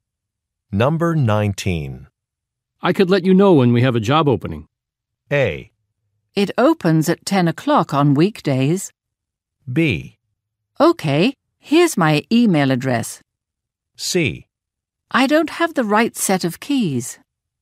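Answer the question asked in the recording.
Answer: B: Okay. Here's my email address.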